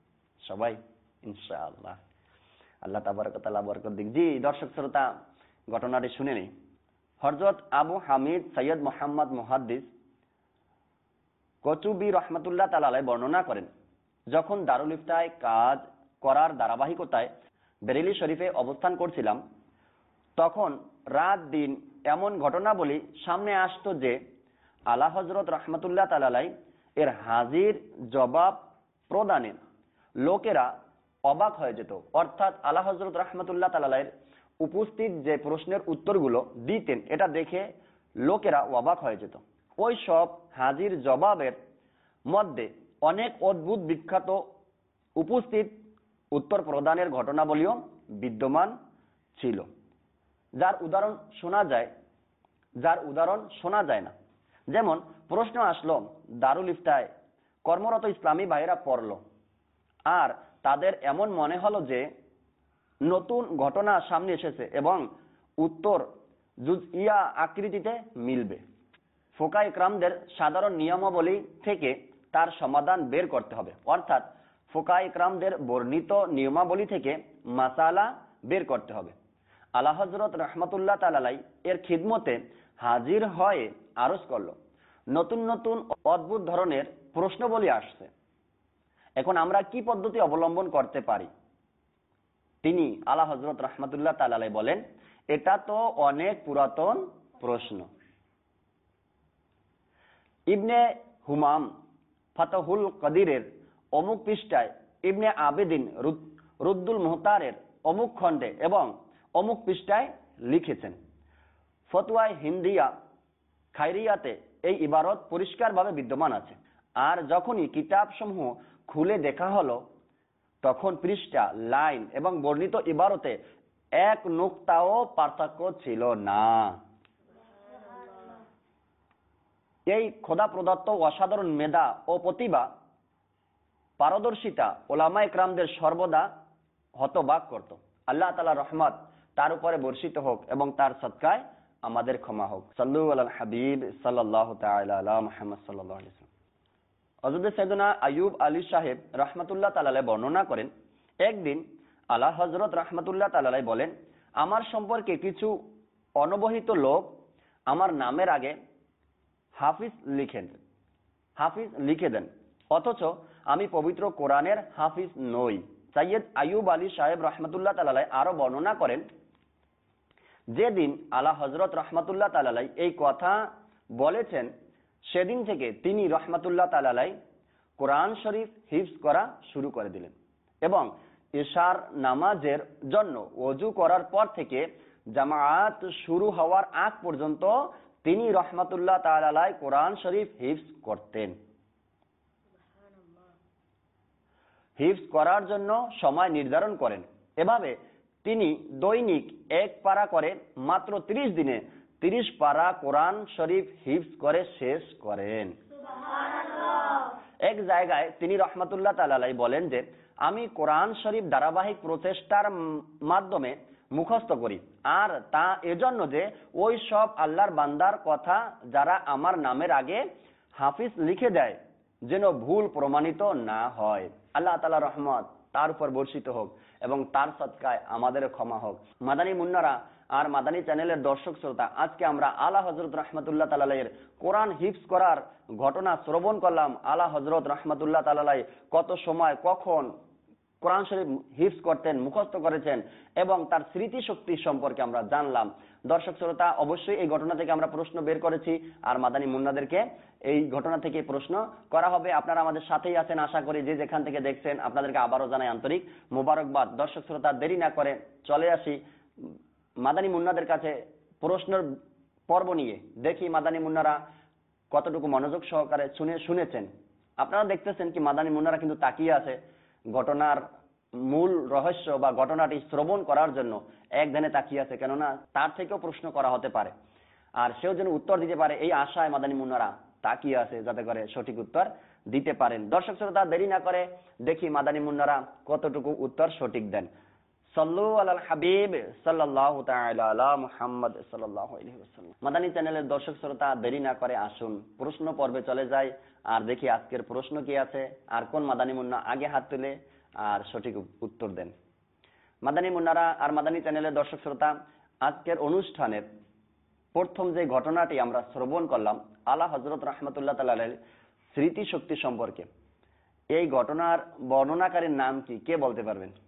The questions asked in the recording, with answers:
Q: আজকের অনুষ্ঠানের প্রথম যে ঘটনাটি আমরা শ্রবণ করলাম আলা হযরত রহমাতুল্লাহ তাআলার স্মৃতিশক্তি সম্পর্কে, এই ঘটনার বর্ণনাকারীর নাম কি, কে বলতে পারবেন?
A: আবু হামিদ সৈয়দ মোহাম্মদ মুহাদ্দিস।